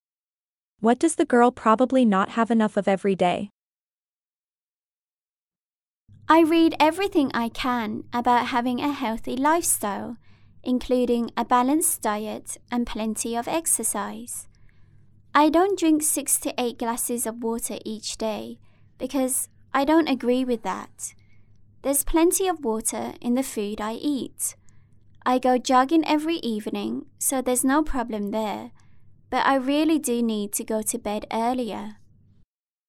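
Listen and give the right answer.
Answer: sleep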